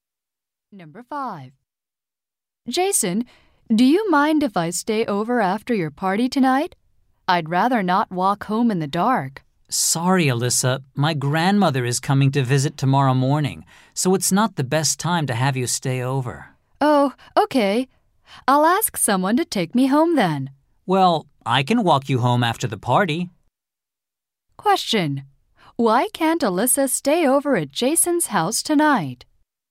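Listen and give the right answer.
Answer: His grandmother is coming to visit tomorrow morning.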